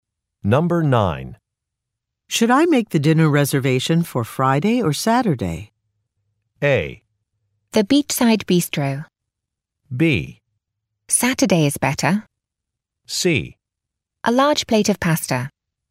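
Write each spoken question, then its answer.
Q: Should I make the dinner reservation for Friday or Saturday?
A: B: Saturday is better.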